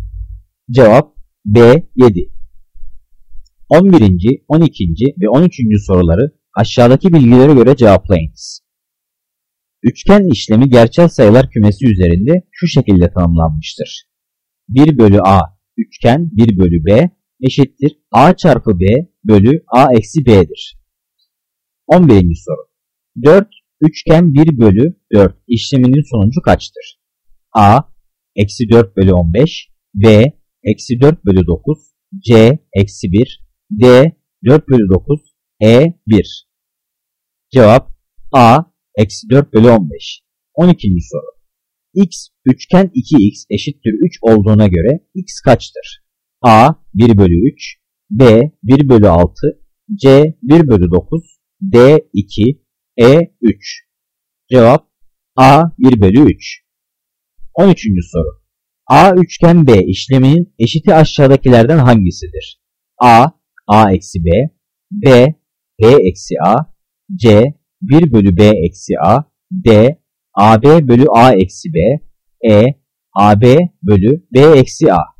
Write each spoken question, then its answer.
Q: 11. soru. 4 üçgen 1 bölü 4 işleminin sonucu kaçtır?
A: Cevap A eksi 4 bölü 15.

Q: X üçgen 2x eşittir 3 olduğuna göre x kaçtır?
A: Cevap A 1 bölü 3.

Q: A üçgen B işleminin eşiti aşağıdakilerden hangisidir?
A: Cevap C, 1 bölü B eksi A.